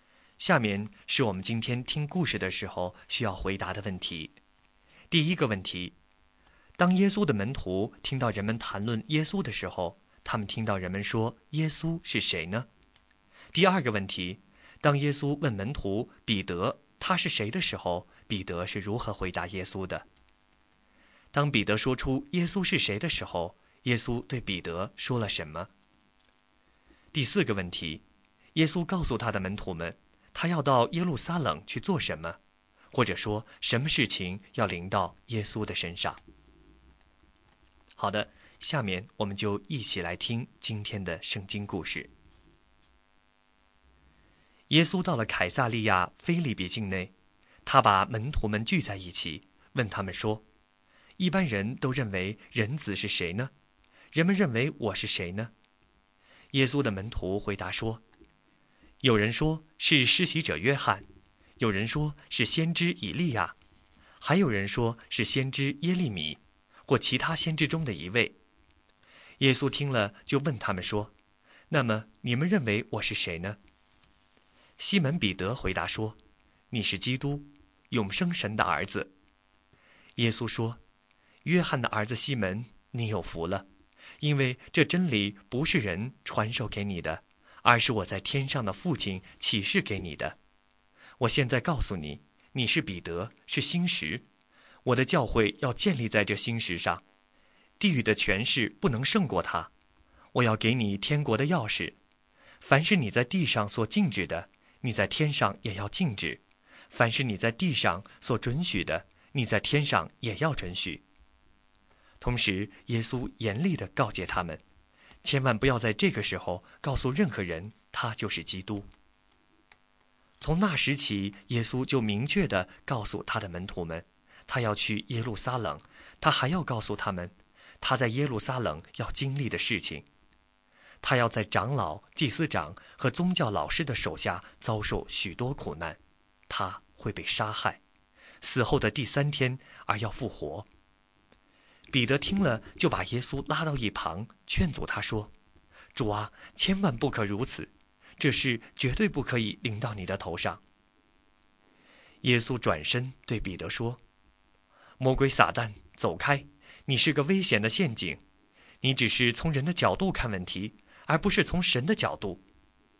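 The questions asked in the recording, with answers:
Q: 当耶稣的门徒听到人们谈论耶稣的时候,他们听到人们说耶稣是谁呢?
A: 有人说是施洗者约翰,有人说是先知以利亚,还有人说是先知耶利米或其他先知中的一位

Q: 当耶稣问门徒彼得他是谁的时候,彼得是如何回答耶稣的?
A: 你是基督,永生神的儿子

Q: 当彼得说出耶稣是谁的时候,耶稣对彼得说了什么?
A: 彼得有福了,这真理是天父启示的;教会要建立在这磐石上,并给他天国的钥匙

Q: 耶稣告诉他的门徒们,他要到耶路撒冷去做什么?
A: 在长老、祭司长和宗教老师手下受许多苦,被杀害,第三天复活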